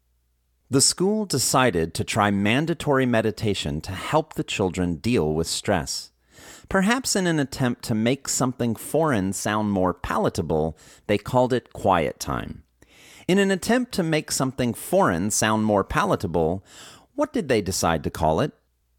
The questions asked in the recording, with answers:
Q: In an attempt to make something foreign sound more palatable, what did they decide to call it?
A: They decided to call it quiet time.